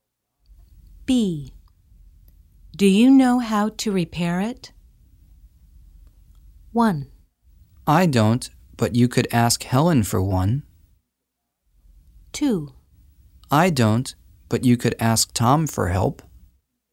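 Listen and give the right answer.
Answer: 2: I don't, but you could ask Tom for help.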